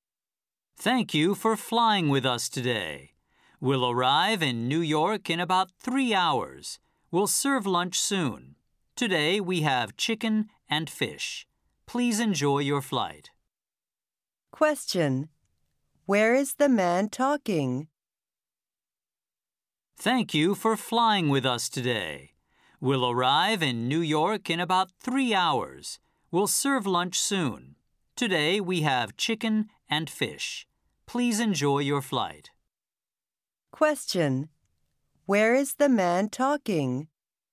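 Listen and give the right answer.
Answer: On an airplane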